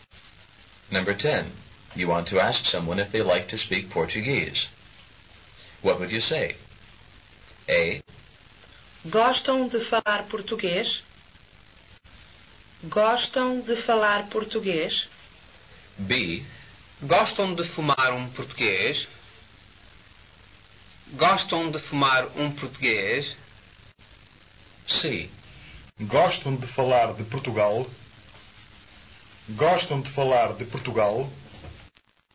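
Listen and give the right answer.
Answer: A: Gostam de falar português?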